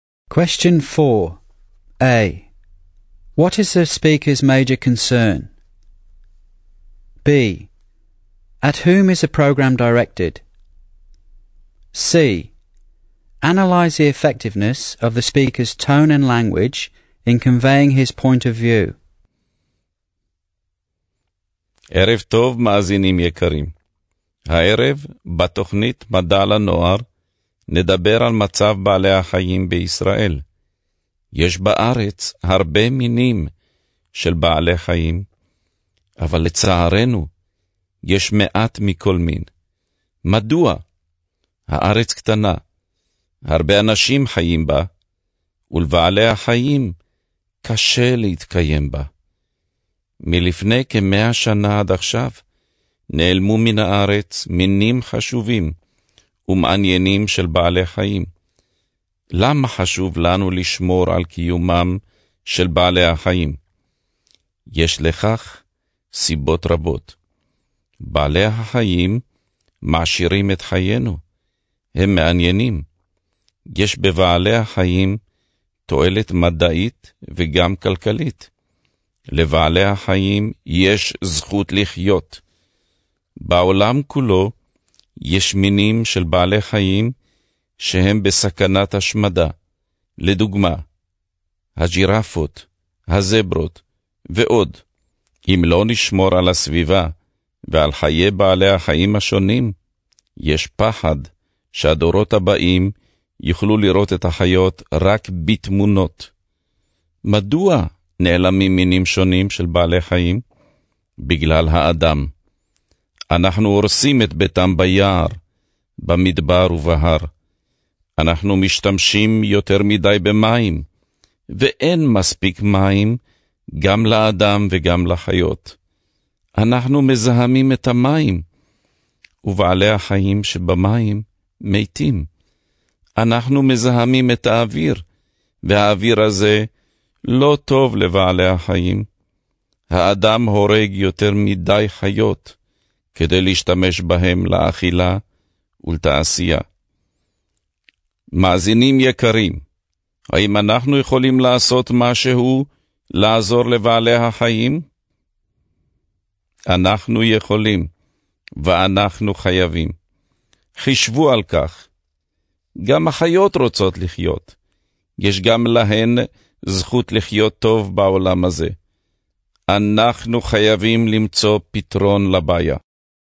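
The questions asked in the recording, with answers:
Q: What is the speaker's major concern?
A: Many animal species are disappearing from Israel (and the world) because of humans, and they need protecting

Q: At whom is the program directed?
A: Young people (listeners of the youth science program)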